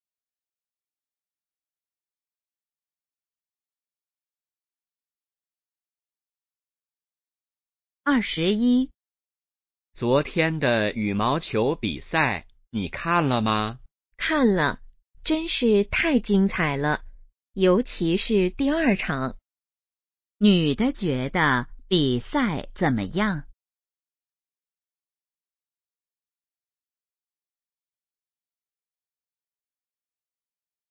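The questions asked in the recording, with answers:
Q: 女的觉得比赛怎么样?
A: 非常精彩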